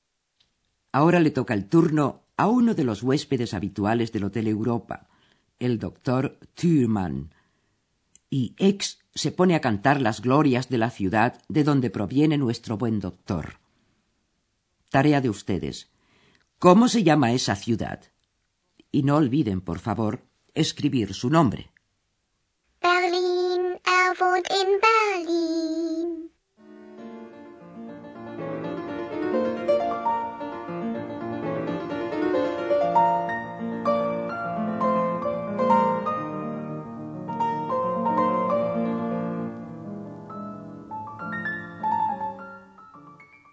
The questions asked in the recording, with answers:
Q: Tarea de ustedes. ¿Cómo se llama esa ciudad?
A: ese nombre era, evidentemente, Berlín.